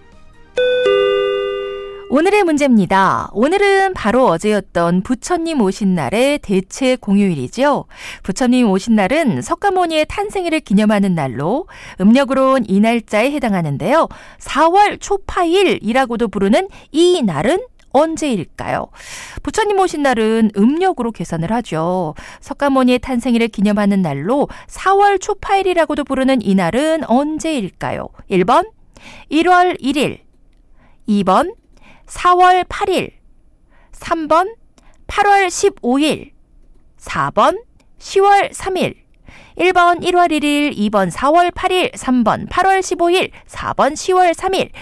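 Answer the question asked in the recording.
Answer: 2번: 4월 8일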